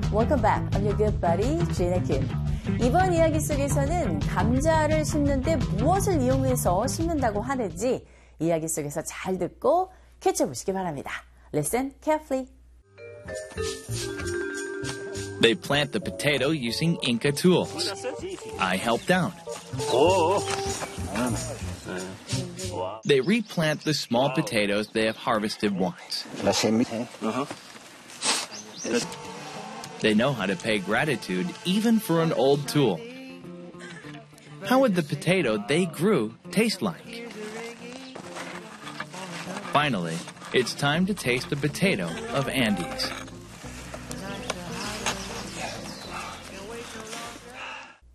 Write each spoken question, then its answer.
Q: 이번 이야기 속에서는 감자를 심는데 무엇을 이용해서 심는다고 하는지 이야기 속에서 잘 듣고 캐치해 보시기 바랍니다.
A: There you go. Inca tool. Inca 도구를 사용해서 감자를 심고 캐고 하는 모습을 보셨어요.